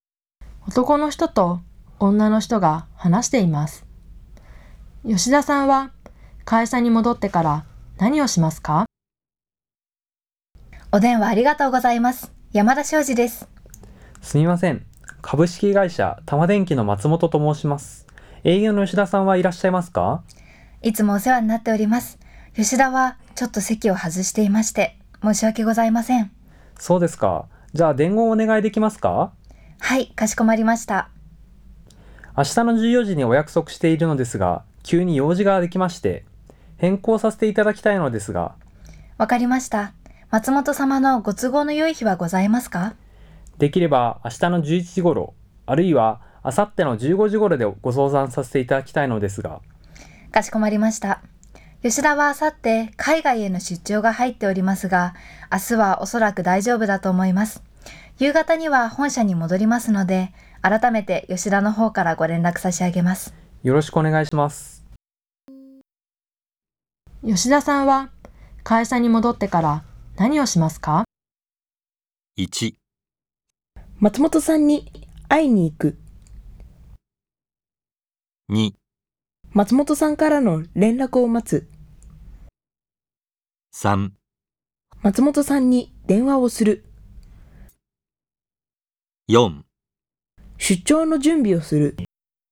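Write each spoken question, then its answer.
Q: 吉田さんは会社に戻ってから何をしますか?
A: 3: 松本さんに電話をする。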